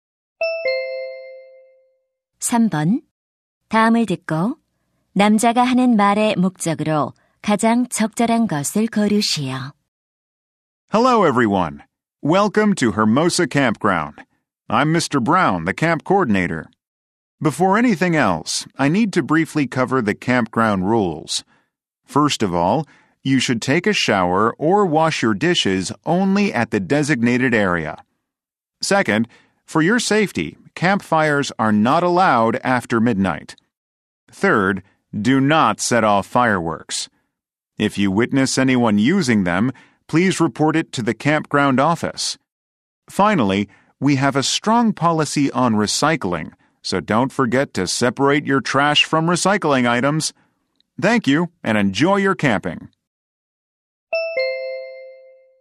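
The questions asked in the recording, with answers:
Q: 다음을 듣고 남자가 하는 말의 목적으로 가장 적절한 것을 고르시오.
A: 캠핑장 규칙을 안내하려고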